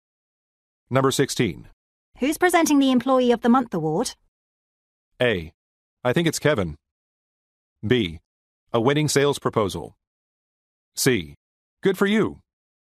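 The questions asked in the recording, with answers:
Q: Who's presenting the Employee of the Month award?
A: A: I think it's Kevin.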